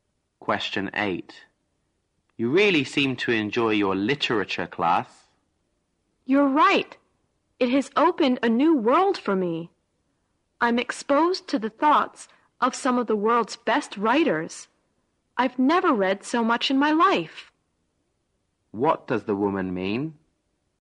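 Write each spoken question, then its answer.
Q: What does the woman mean?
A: She is enjoying her literature class and reading a lot more than before.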